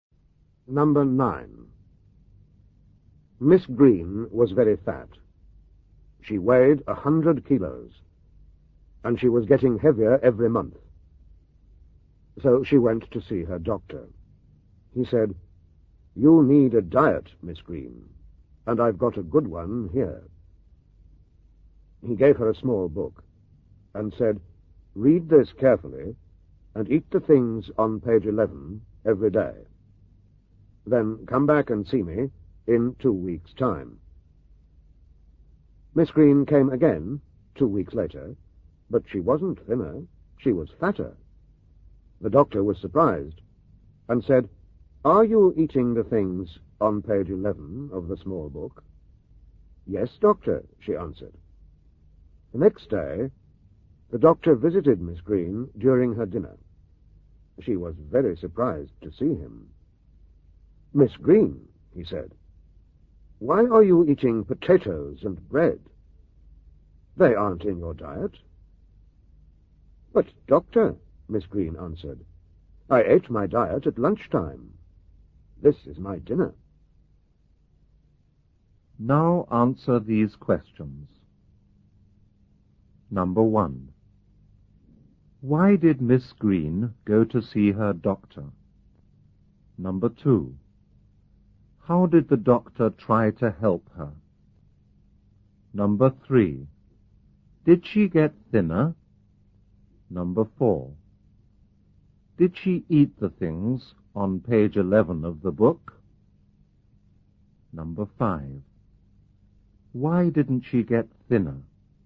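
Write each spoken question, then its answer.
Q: Why did Miss Green go to see her doctor?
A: Because she was very fat and getting heavier

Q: How did the doctor try to help her?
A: He gave her a diet in a small book

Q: Did she get thinner?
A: No, she got fatter

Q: Did she eat the things on page 11 of the book?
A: Yes, at lunchtime

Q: Why didn't she get thinner?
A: She ate her diet at lunch and then ate a normal dinner too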